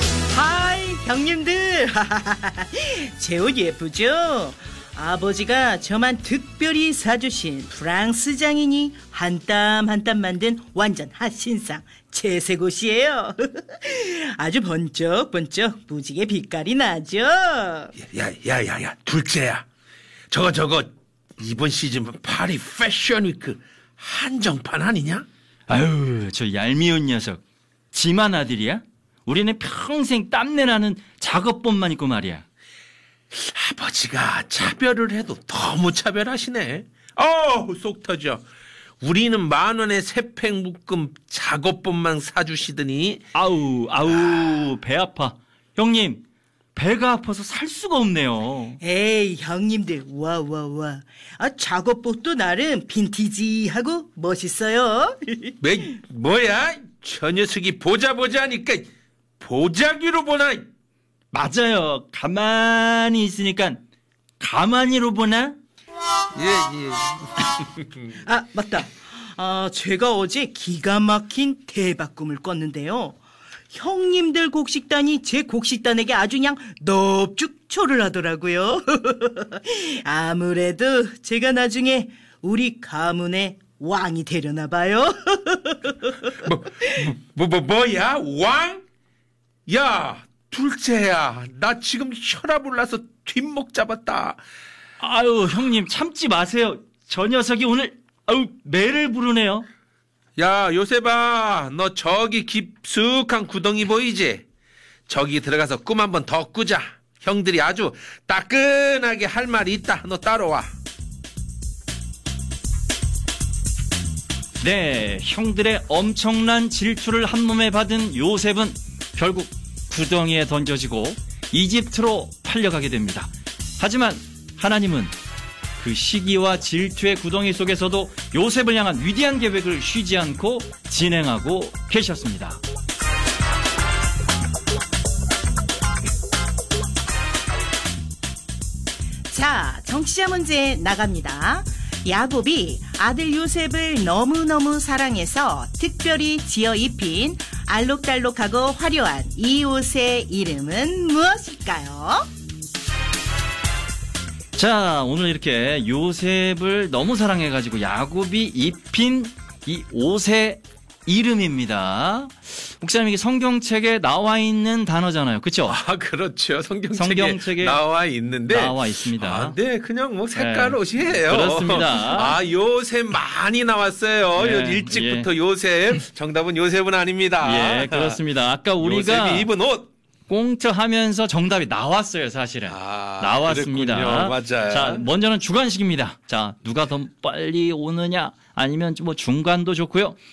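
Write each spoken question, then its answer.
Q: 야곱이 아들 요셉을 너무너무 사랑해서 특별히 지어 입힌 알록달록하고 화려한 이 옷의 이름은 무엇일까요?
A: 채색옷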